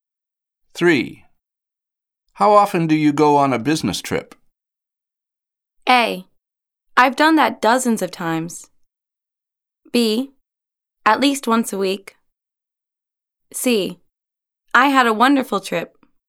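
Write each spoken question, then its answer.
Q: How often do you go on a business trip?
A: B: At least once a week.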